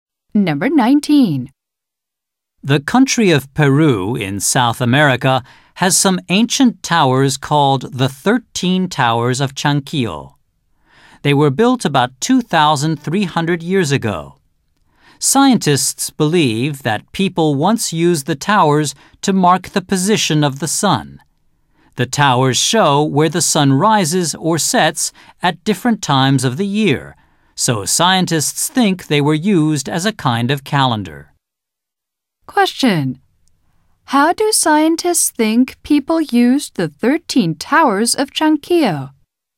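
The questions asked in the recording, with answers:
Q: How do scientists think people used the 13 Towers of Chanquillo?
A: As a kind of calendar, to mark the position of the sun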